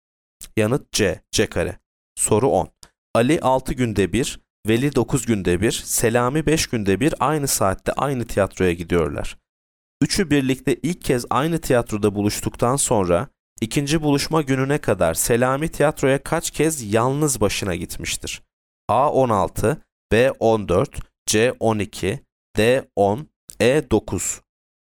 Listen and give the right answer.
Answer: Yanıt B, 14.